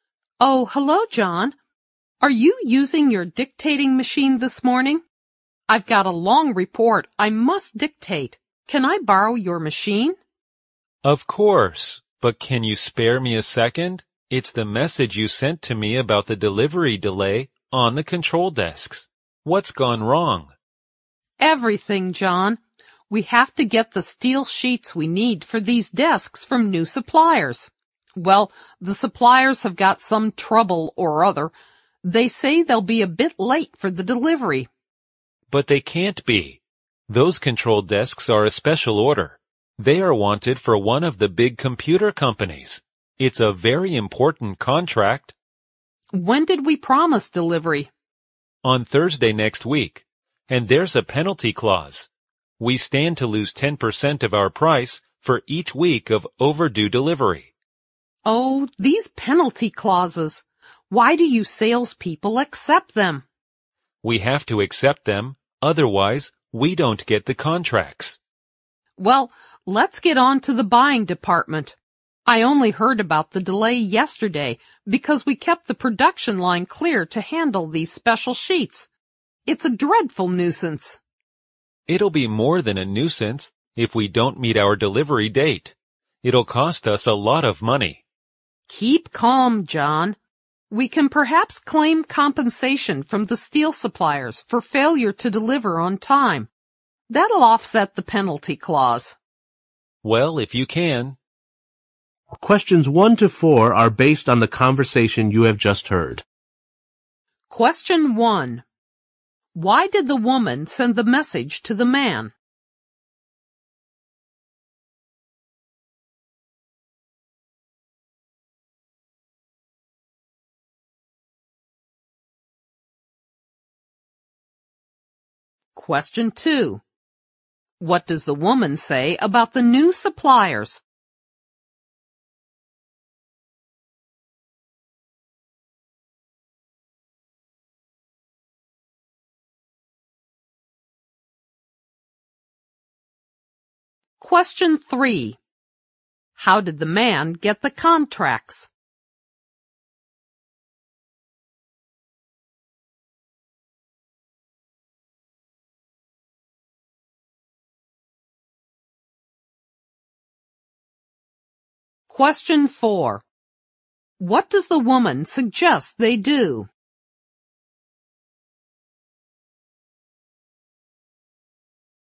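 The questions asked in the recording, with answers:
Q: Why did the woman send the message to the man?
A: To tell him about the delivery delay on the control desks

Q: What does the woman say about the new suppliers?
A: They have some trouble and will be late with the delivery of steel sheets

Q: How did the man get the contracts?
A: By accepting penalty clauses

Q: What does the woman suggest they do?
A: Claim compensation from the steel suppliers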